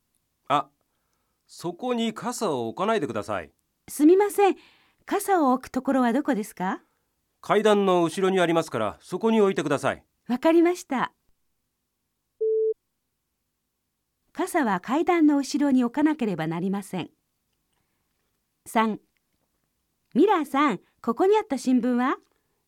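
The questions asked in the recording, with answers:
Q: 傘は階段の後ろに置かなければなりません。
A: ○(正しい)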